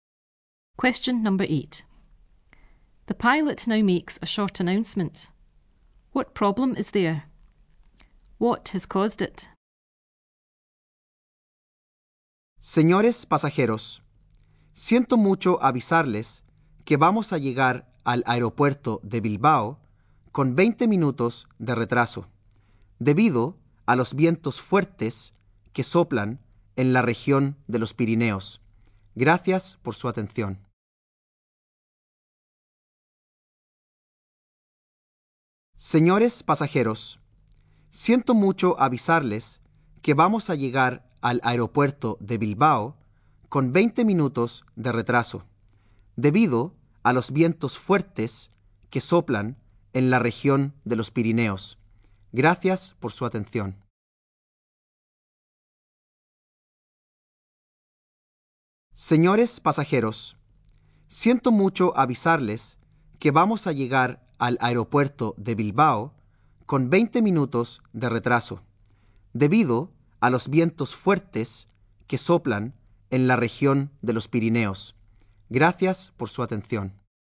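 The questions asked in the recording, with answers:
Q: What problem is there?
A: They will arrive in Bilbao 20 minutes late

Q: What has caused it?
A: Strong winds in the Pyrenees region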